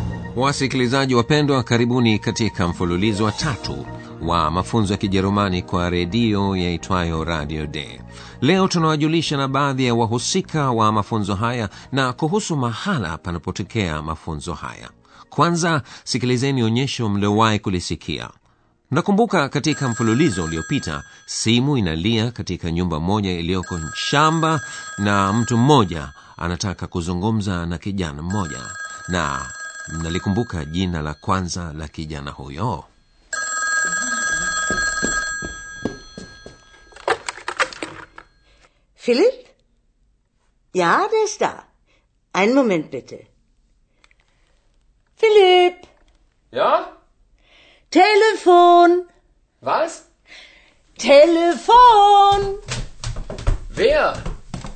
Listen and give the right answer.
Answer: kijana huyo anaitwa philip